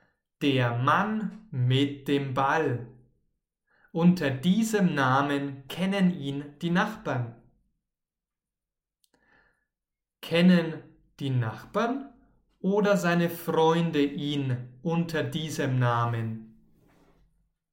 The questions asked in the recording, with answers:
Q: Kennen die Nachbarn oder seine Freunde ihn unter diesem Namen?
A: Die Nachbarn, genau. Die Nachbarn kennen ihn unter diesem Namen.